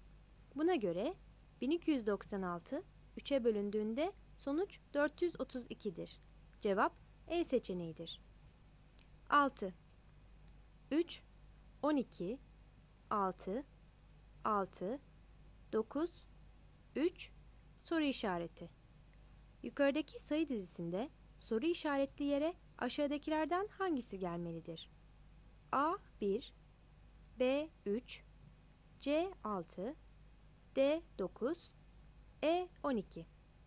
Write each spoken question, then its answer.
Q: Yukarıdaki sayı dizisinde soru işaretli yere aşağıdakilerden hangisi gelmelidir?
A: Cevap E'dir.